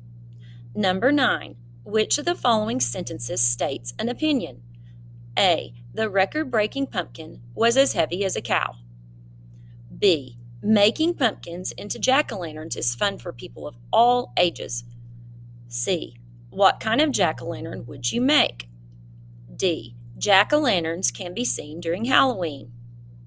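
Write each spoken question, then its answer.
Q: Which of the following sentences states an opinion?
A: B: Making pumpkins into jack-o'-lanterns is fun for people of all ages.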